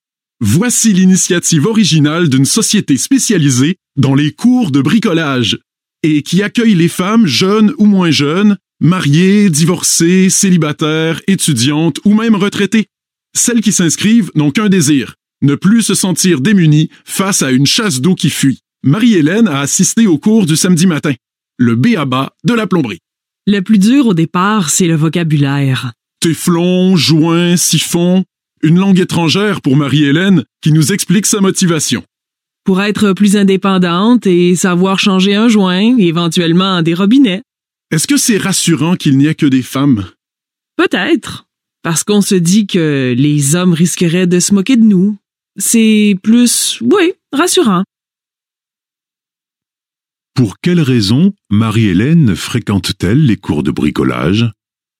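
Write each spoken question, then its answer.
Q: Pour quelle raison Marie-Hélène fréquente-t-elle les cours de bricolage?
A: Pour être plus indépendante et savoir changer un joint, éventuellement des robinets.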